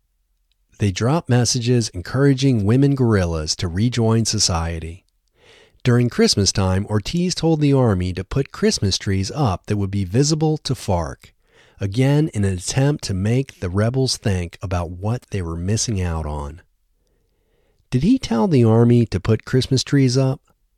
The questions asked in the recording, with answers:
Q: Did he tell the army to put Christmas trees up?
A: Yes, he told the army to put Christmas trees up.